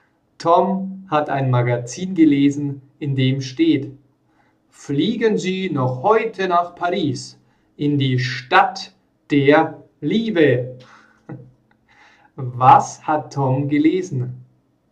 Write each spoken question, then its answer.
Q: Was hat Tom gelesen?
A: Ein Magazin.